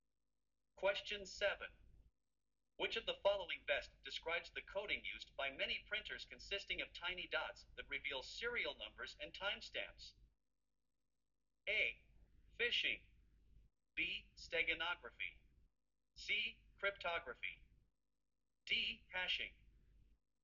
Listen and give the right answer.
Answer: The correct answer is B.